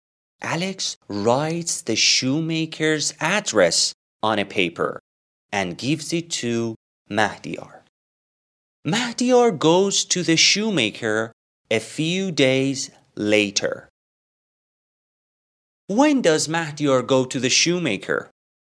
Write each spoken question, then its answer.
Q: When does Mahdiyar go to the shoemaker?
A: Great, a few days later.